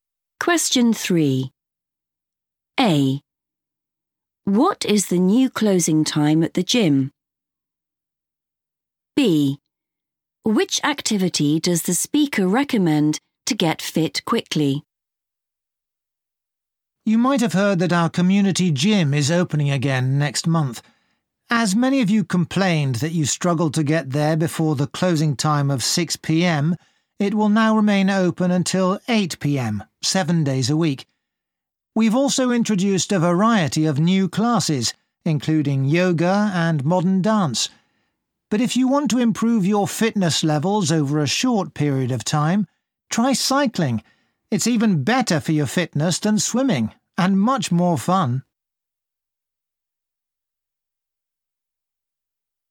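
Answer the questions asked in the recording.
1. 8 p.m.
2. cycling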